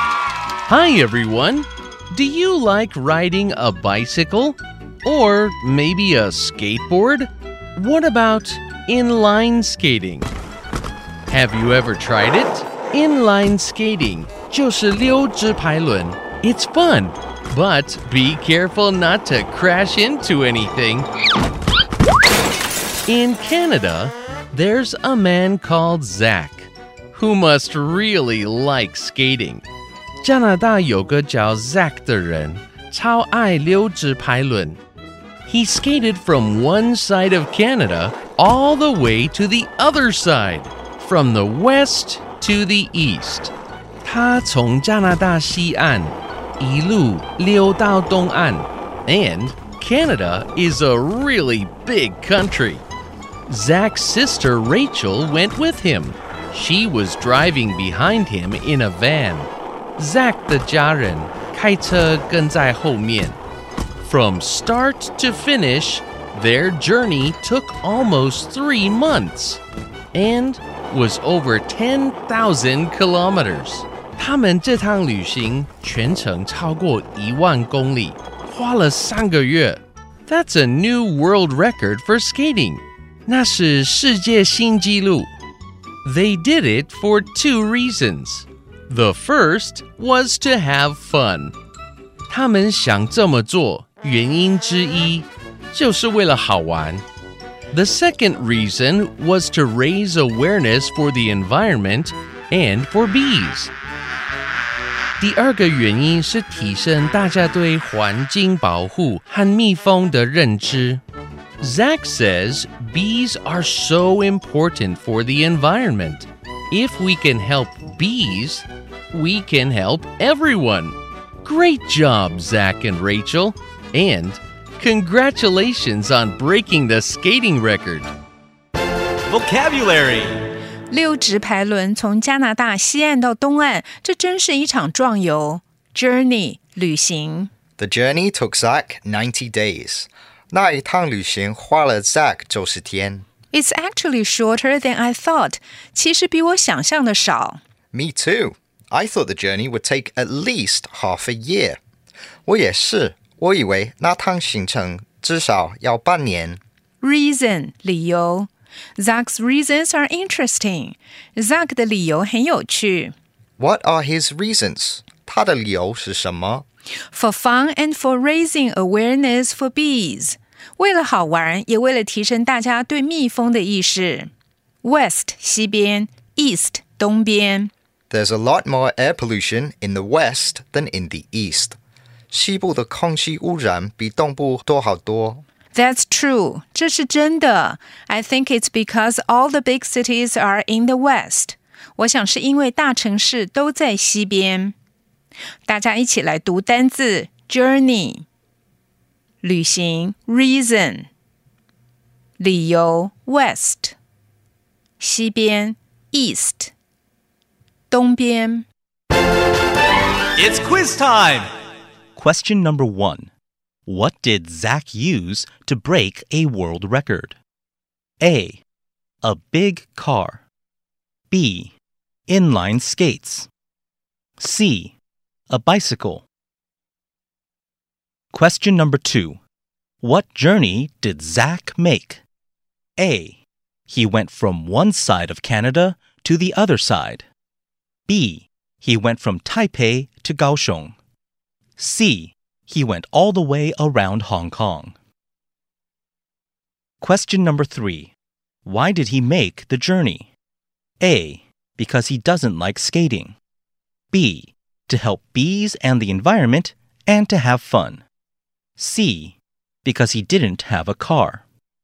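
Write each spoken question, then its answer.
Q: What did Zach use to break a world record?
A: B: Inline skates.

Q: What journey did Zach make?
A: A: He went from one side of Canada to the other side.

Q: Why did he make the journey?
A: B: To help bees and the environment and to have fun.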